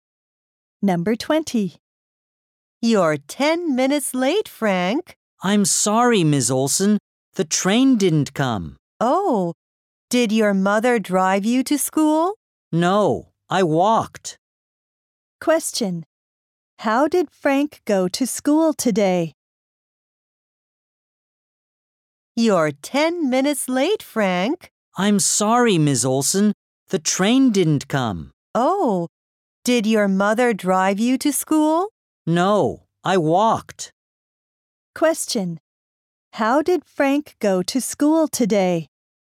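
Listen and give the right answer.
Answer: He walked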